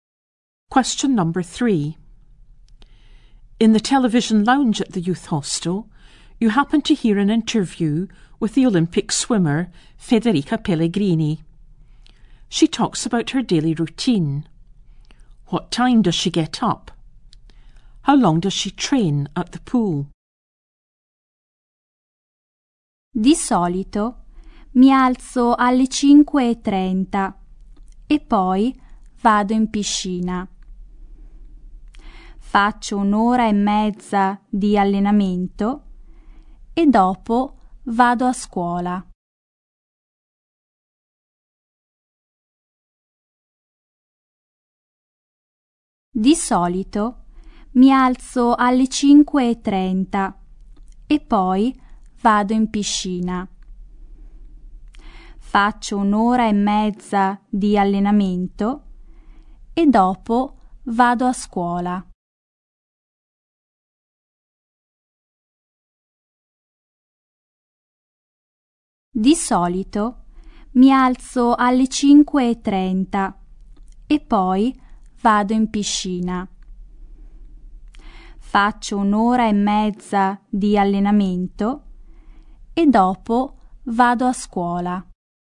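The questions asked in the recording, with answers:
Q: What time does she get up?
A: 5:30

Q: How long does she train at the pool?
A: An hour and a half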